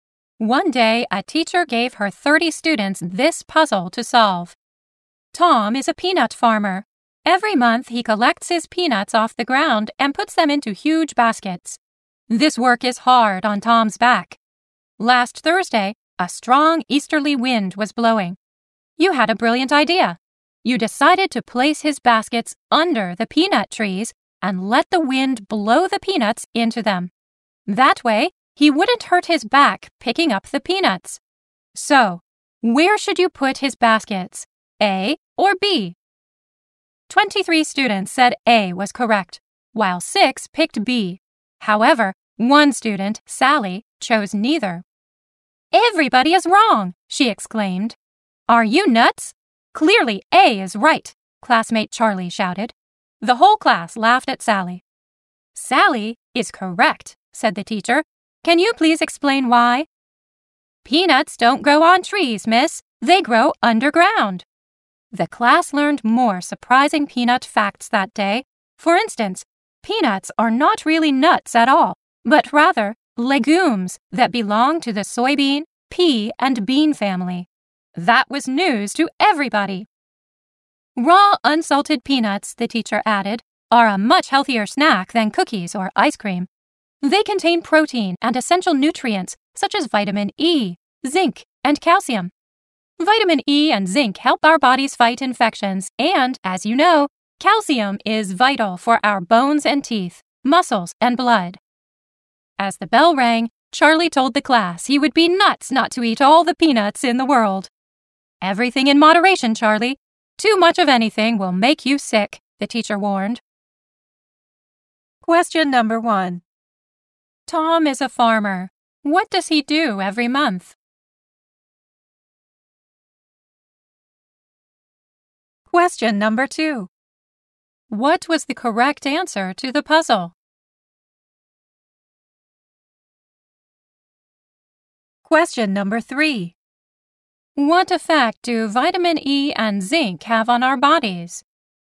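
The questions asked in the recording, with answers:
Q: Tom is a farmer. What does he do every month?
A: He collects his peanuts off the ground and puts them into huge baskets.

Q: What was the correct answer to the puzzle?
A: Neither; peanuts don't grow on trees, they grow underground.

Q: What effect do vitamin E and zinc have on our bodies?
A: They help our bodies fight infections.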